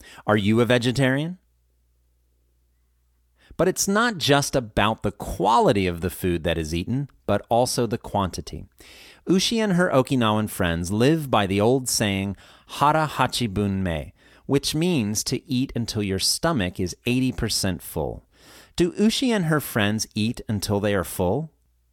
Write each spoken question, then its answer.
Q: Do Ushi and her friends eat until they are full?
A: No, they stop eating when their stomachs are 80% full.